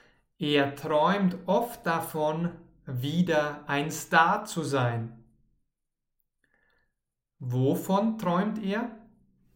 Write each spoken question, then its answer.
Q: Wovon träumt er?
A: Er träumt davon, wieder ein Star zu sein.